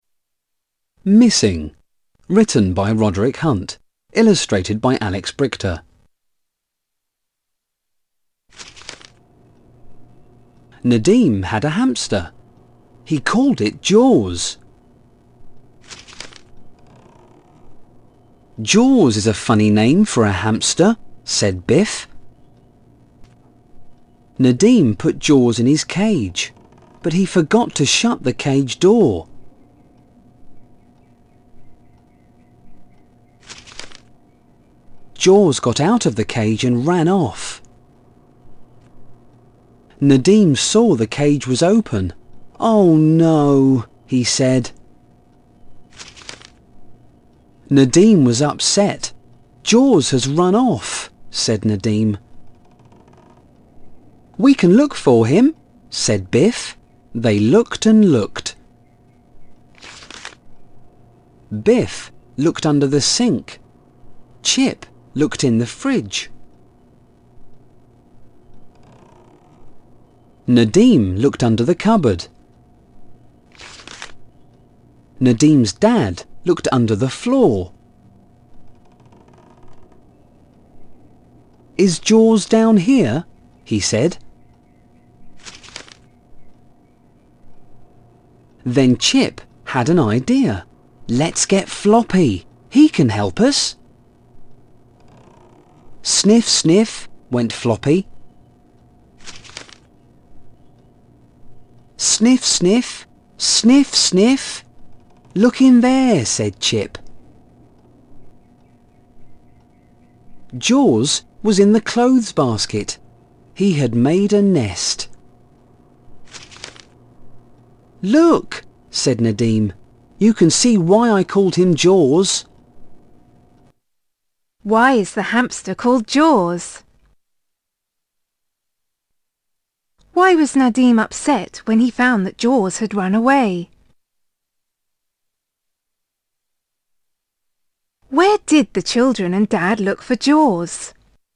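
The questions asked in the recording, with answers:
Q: Where did the children and Dad look for Jaws?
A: Under the sink, in the fridge, under the cupboard and under the floor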